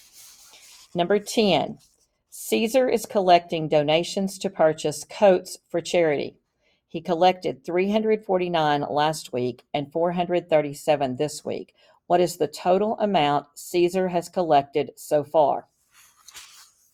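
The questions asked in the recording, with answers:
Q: What is the total amount Caesar has collected so far?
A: 786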